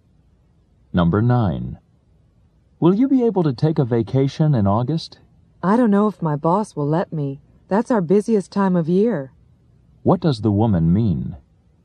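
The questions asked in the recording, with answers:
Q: What does the woman mean?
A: She may not get a vacation in August because it is her company's busiest time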